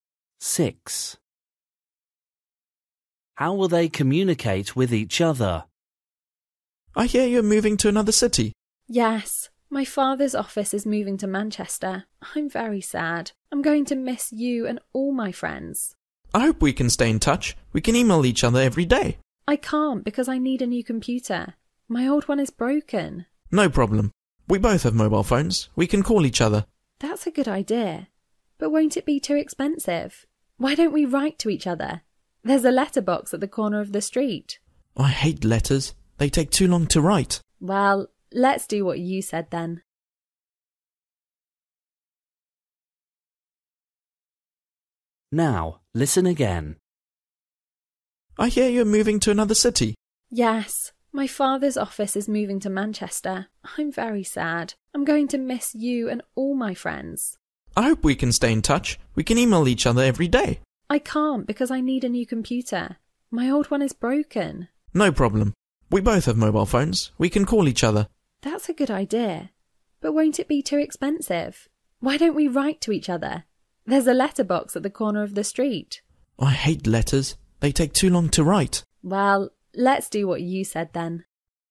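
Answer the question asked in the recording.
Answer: By calling each other on mobile phones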